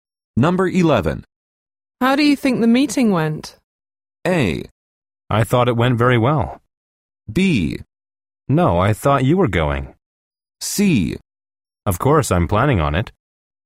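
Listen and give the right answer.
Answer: A: I thought it went very well.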